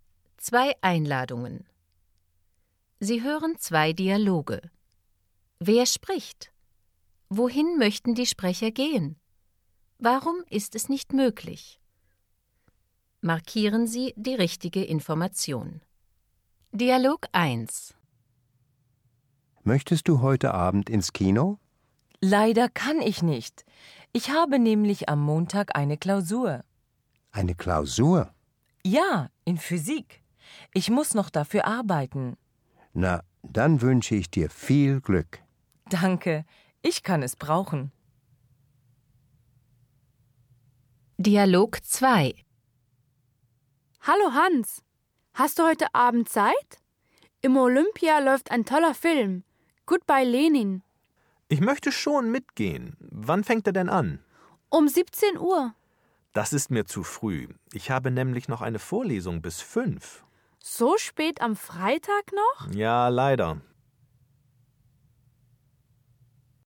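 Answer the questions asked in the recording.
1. Ins Kino (Dialog 2: ins Olympia, Film „Goodbye Lenin")
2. Dialog 1: Klausur in Physik am Montag; Dialog 2: Vorlesung bis 5 Uhr, Film um 17 Uhr ist zu früh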